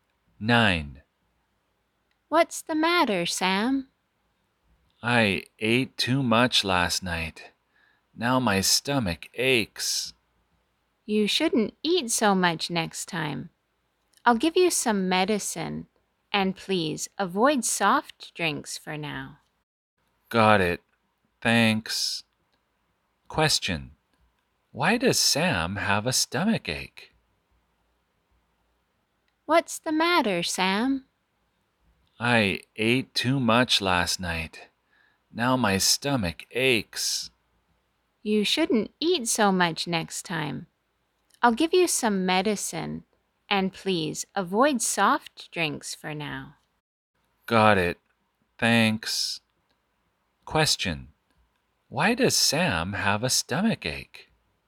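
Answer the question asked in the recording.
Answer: He ate too much last night.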